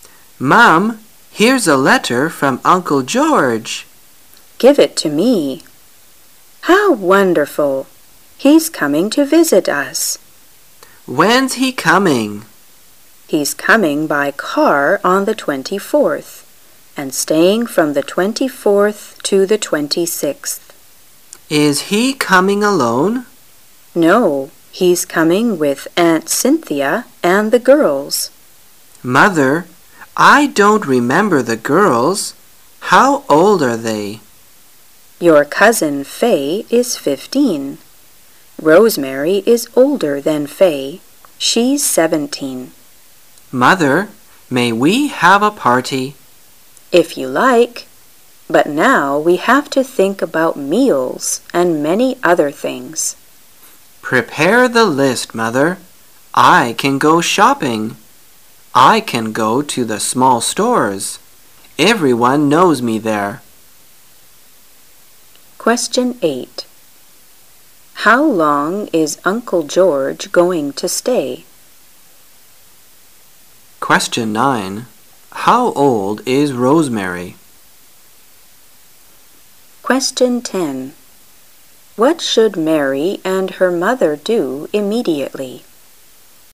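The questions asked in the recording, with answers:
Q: How long is Uncle George going to stay?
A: From the 24th to the 26th

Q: How old is Rosemary?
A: 17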